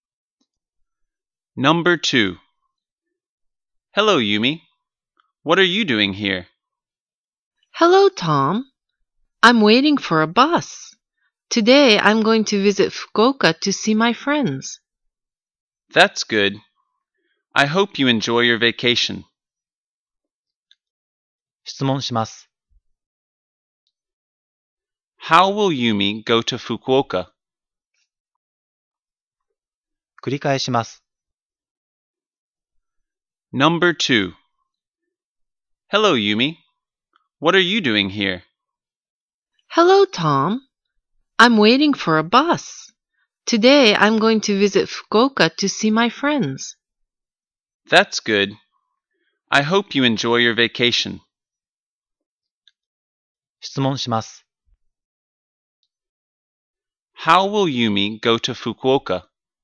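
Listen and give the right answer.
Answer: By bus.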